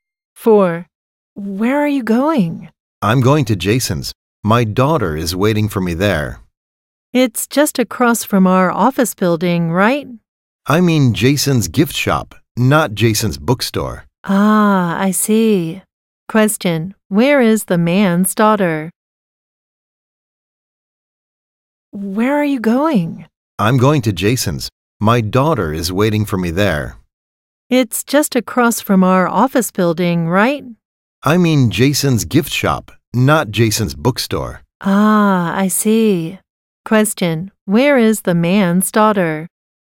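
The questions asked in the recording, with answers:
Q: Question, where is the man's daughter?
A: At Jason's gift shop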